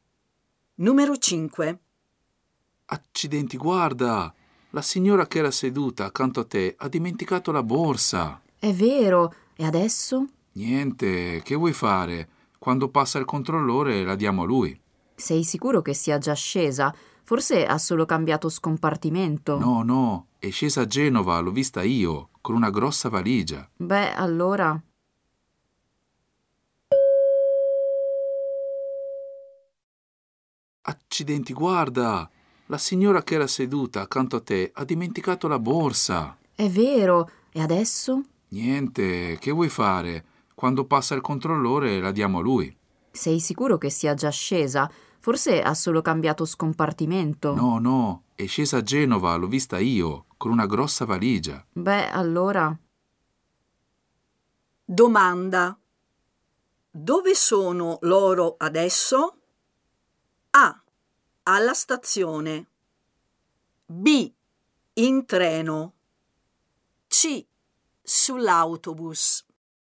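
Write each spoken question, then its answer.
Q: Domanda. Dove sono loro adesso?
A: B: In treno.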